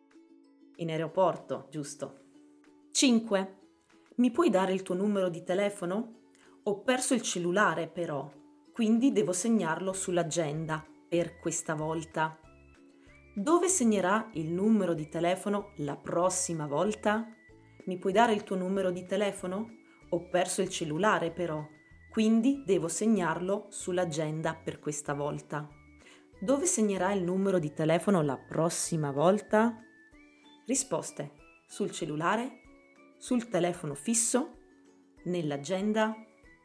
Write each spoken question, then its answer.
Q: Dove segnerà il numero di telefono la prossima volta?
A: sul cellulare.